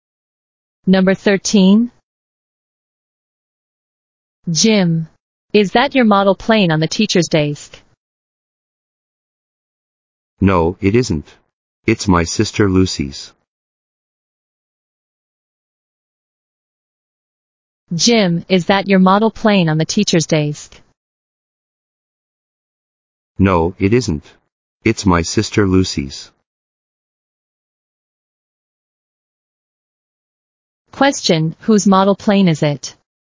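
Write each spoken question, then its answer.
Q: whose model plane is it?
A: Jim's sister Lucy's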